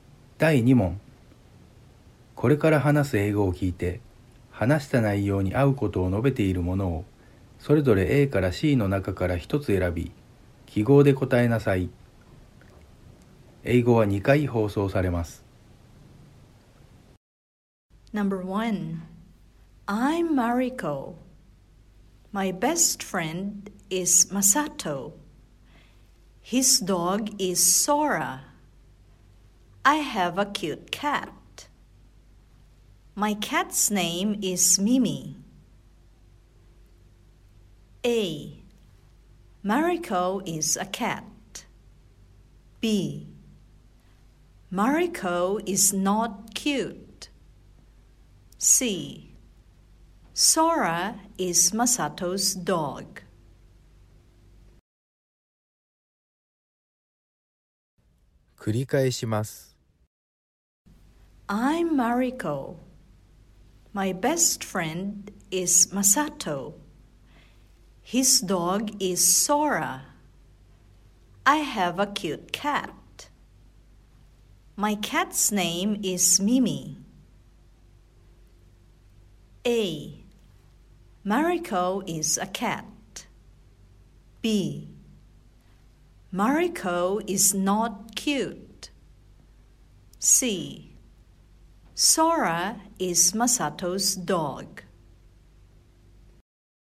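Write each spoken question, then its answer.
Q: これから話す英語を聞いて、話した内容に合うことを述べているものを、それぞれ A から C の中から一つ選び、記号で答えなさい。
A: C: Sora is Masato's dog.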